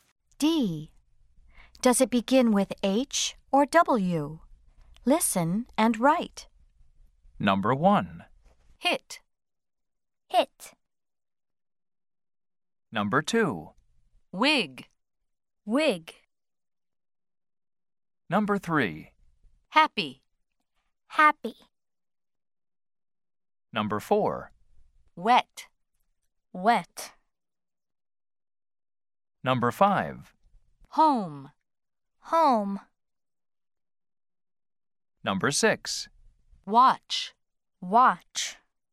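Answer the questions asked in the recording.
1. H (hit)
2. W (wig)
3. H (happy)
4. W (wet)
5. H (home)
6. W (watch)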